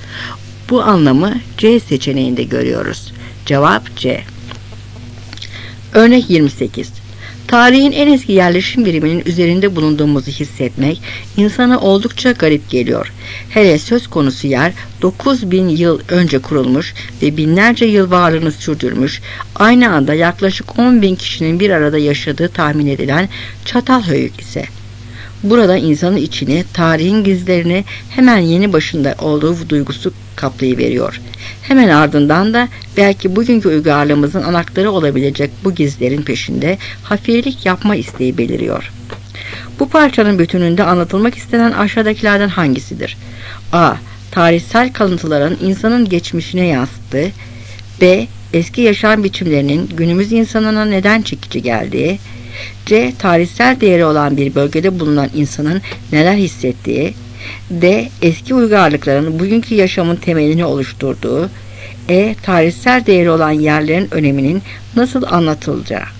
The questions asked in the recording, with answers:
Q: Bu parçanın bütününde anlatılmak istenen aşağıdakilerden hangisidir?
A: Cevap C.